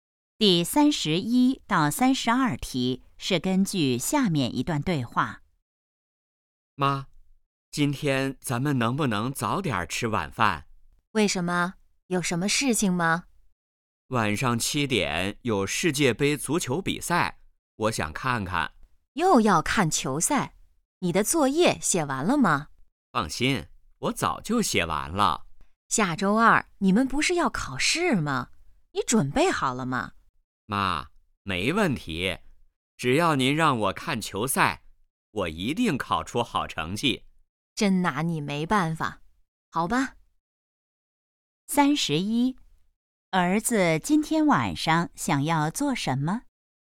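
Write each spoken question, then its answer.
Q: 儿子今天晚上想要做什么?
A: 看世界杯足球比赛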